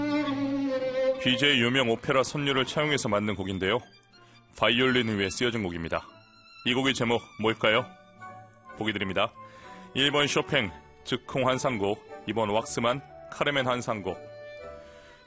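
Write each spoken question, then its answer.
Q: 이 곡의 제목 뭘까요?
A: 2번: 왁스만, 카르멘 환상곡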